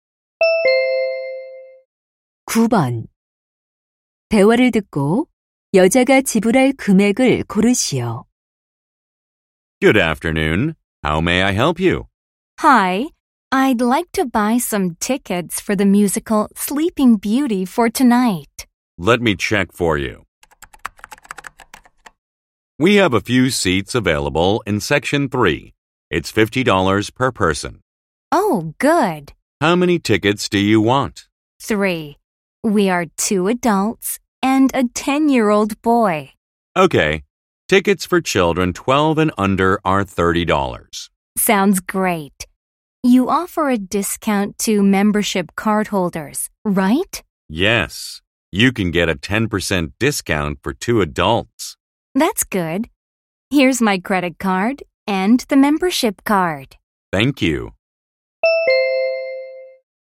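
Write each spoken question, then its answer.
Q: 대화를 듣고 여자가 지불할 금액을 고르시오.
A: 120달러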